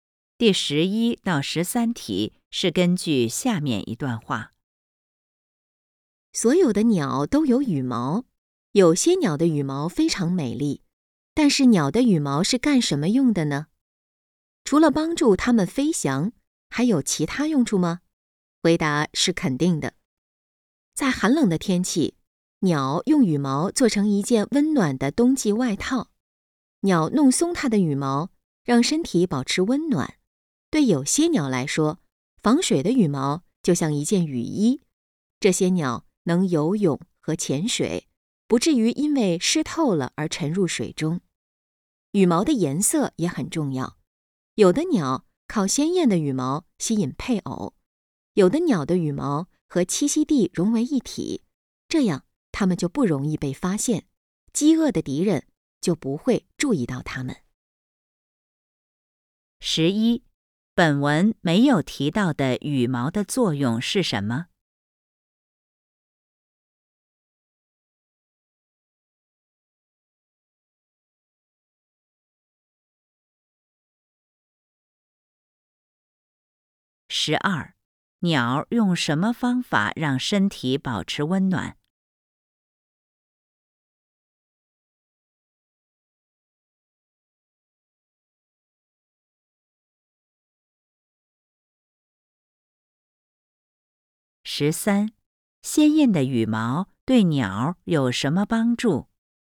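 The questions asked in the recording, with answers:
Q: 鸟用什么方法让身体保持温暖?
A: 弄松它的羽毛

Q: 鲜艳的羽毛对鸟有什么帮助?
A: 吸引配偶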